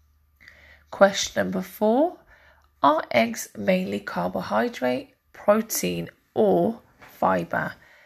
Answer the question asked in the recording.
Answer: And the answer is protein.